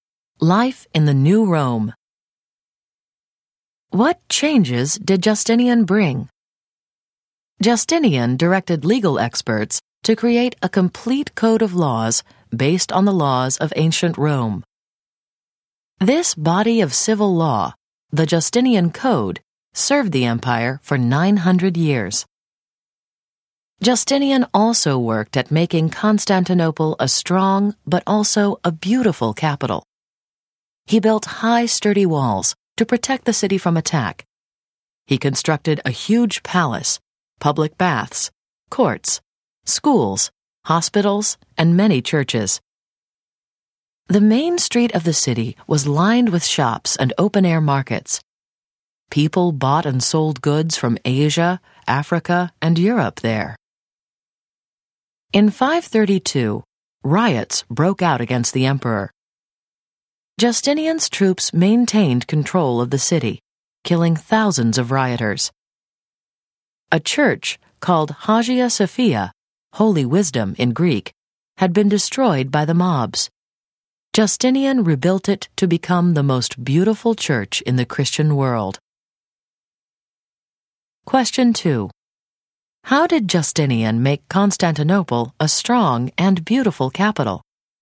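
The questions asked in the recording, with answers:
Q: How did Justinian make Constantinople a strong and beautiful capital?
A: He built high, sturdy walls, a huge palace, baths, courts, schools, hospitals, and churches, and rebuilt Hagia Sophia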